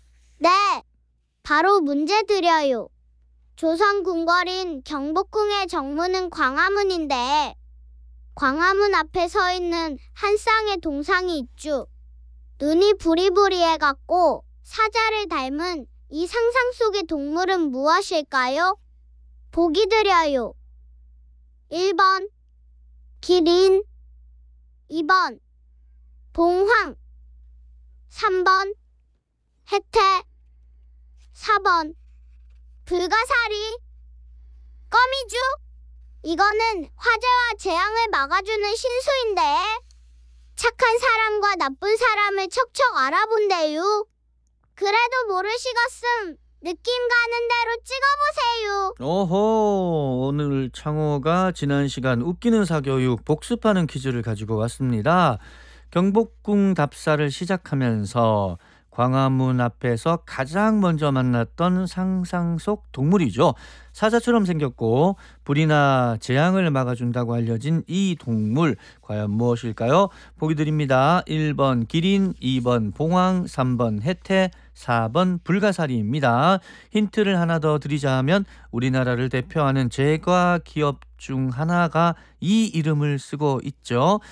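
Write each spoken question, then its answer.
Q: 눈이 부리부리해갖고 사자를 닮은 이 상상 속의 동물은 무엇일까요?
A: 3번: 해태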